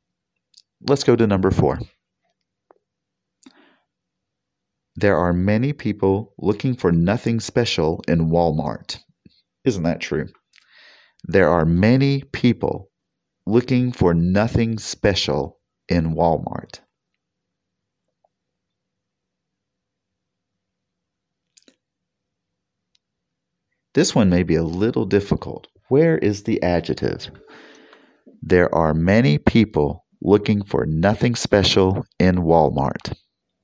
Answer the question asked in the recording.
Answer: Did you choose the word special?